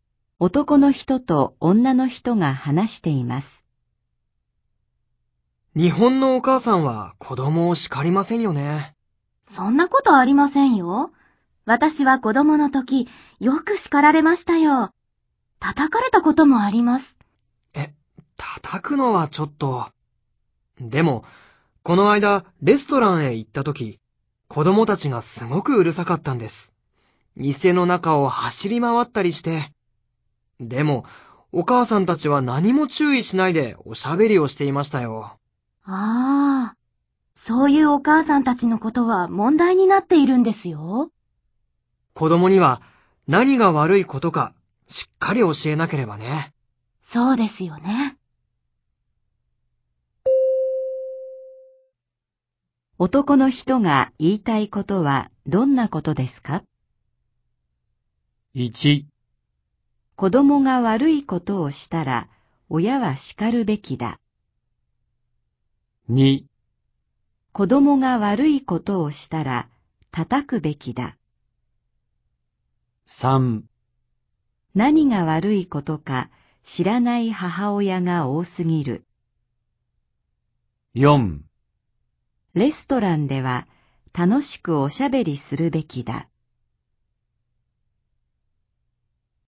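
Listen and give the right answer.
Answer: 1: 子供が悪いことをしたら親は叱るべきだ。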